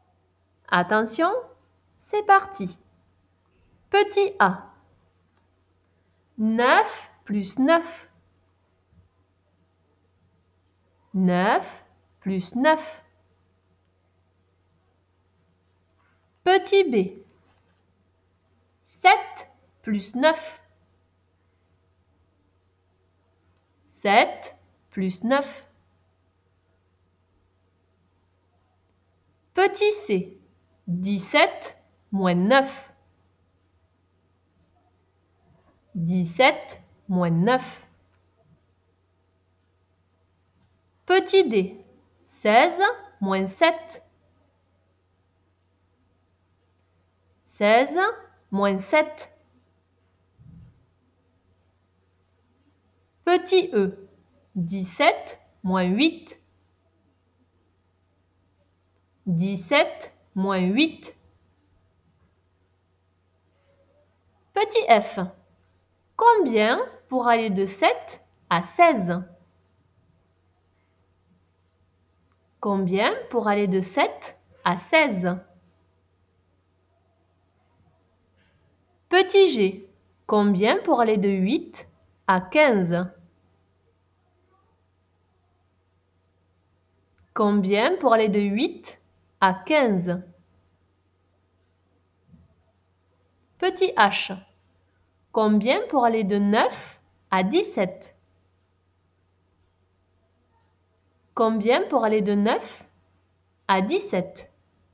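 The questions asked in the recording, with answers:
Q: 9 plus 9.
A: 18

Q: 7 plus 9.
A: 16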